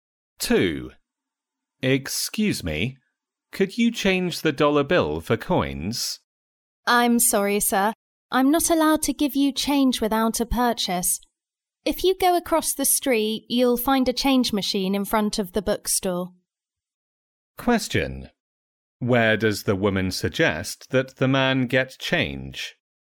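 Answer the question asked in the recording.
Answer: From the change machine in front of the bookstore across the street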